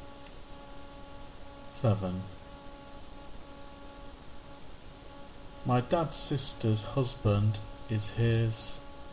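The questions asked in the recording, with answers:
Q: My dad's sister's husband is his.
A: brother-in-law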